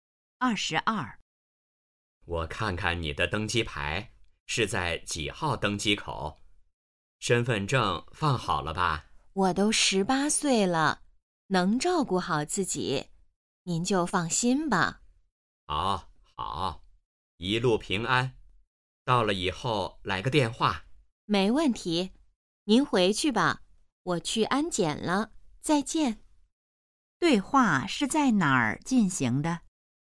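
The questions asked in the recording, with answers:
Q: 对话是在哪儿进行的?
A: 机场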